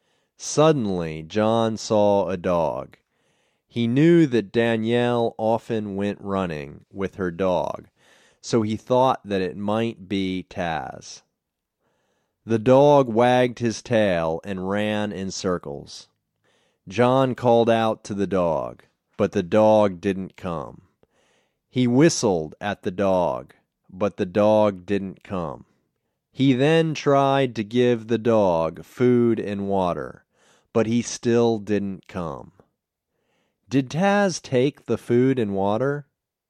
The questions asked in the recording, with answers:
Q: Did Taz take the food and water?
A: No, he didn't take the food and water.